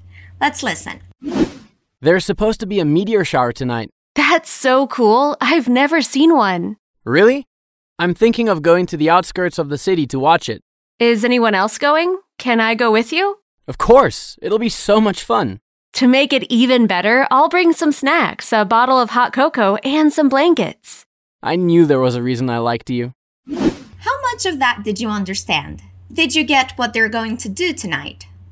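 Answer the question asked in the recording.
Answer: Go to the outskirts of the city to watch a meteor shower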